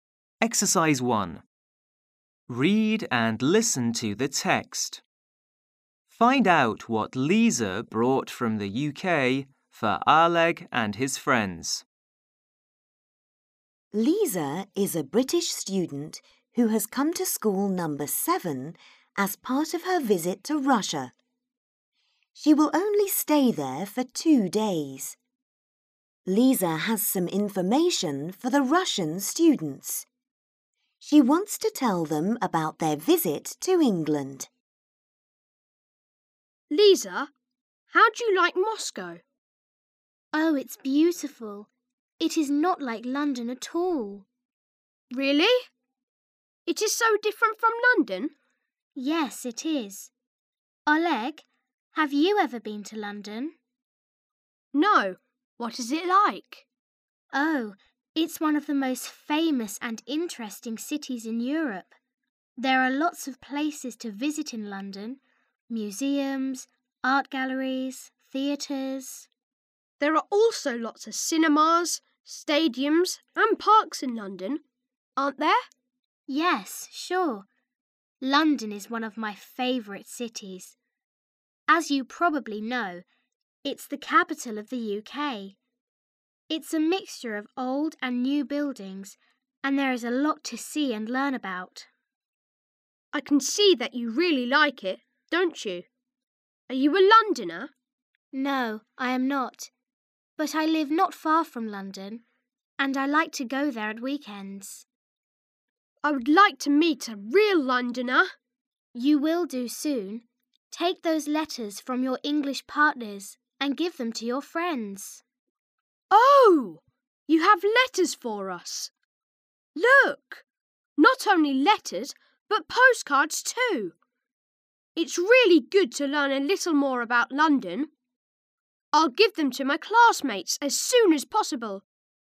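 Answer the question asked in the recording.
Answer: Letters and postcards from their English partners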